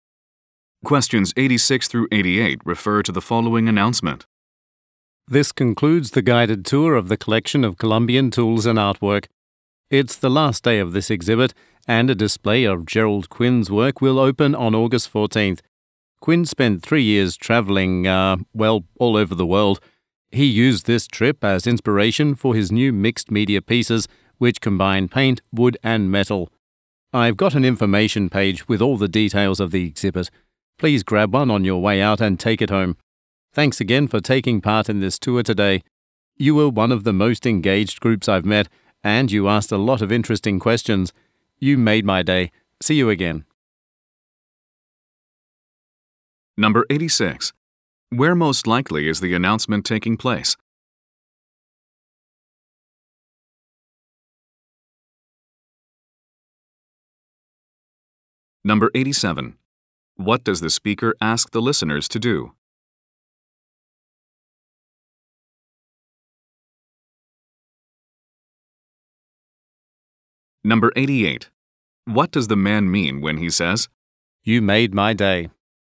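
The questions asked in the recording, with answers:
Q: Where most likely is the announcement taking place?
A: At a museum

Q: What does the speaker ask the listeners to do?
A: Take an information page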